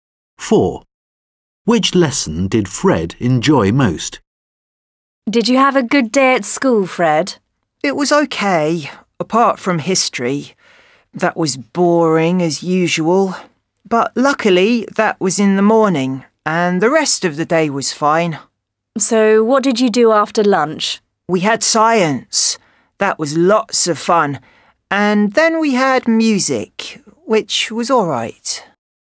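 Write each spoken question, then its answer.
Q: Which lesson did Fred enjoy most?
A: Science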